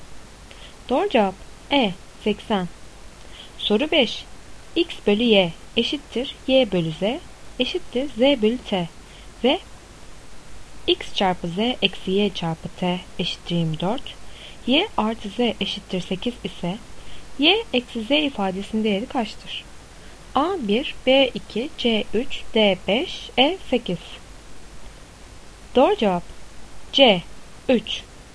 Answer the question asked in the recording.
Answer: Doğru cevap C 3.